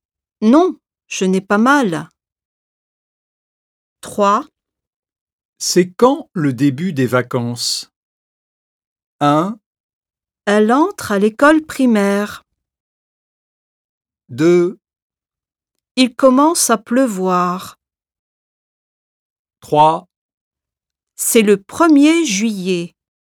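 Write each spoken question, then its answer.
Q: C'est quand le début des vacances?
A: 3: C'est le 1er juillet.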